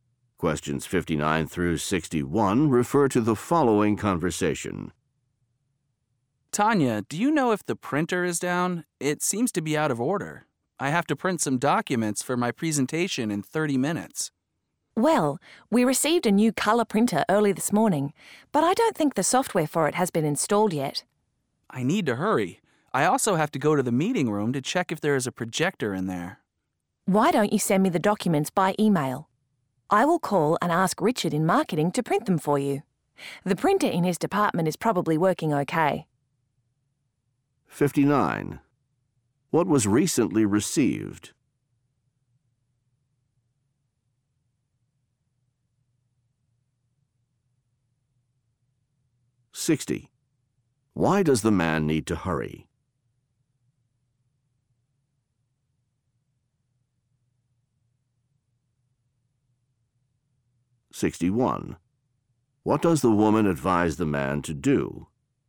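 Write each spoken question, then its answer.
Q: What was recently received?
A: A new color printer

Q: Why does the man need to hurry?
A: He has a presentation in 30 minutes

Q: What does the woman advise the man to do?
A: Email her the documents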